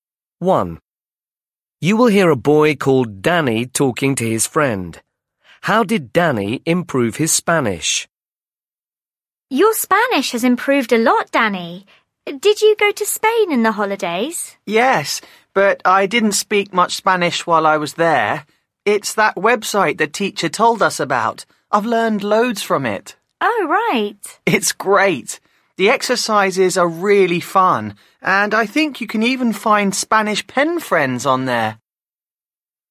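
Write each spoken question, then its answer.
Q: How did Danny improve his Spanish?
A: By using a website the teacher told them about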